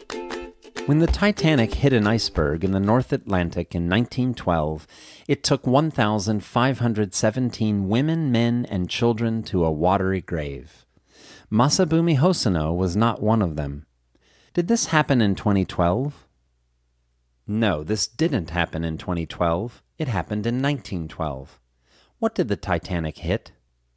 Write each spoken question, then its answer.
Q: What did the Titanic hit?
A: The Titanic hit an iceberg.